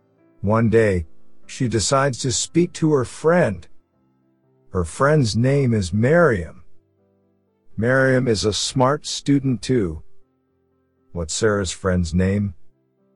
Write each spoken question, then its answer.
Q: What's Sarah's friend's name?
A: Miriam. Her friend's name is Miriam.